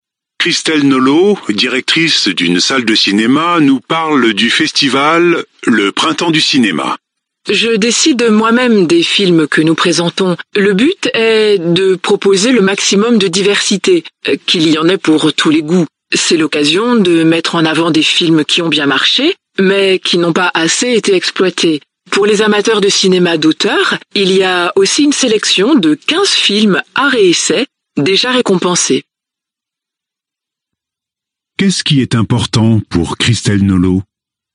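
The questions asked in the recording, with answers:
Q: Qu'est-ce qui est important pour Christelle Nolot ?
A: Proposer le maximum de diversité, qu'il y en ait pour tous les goûts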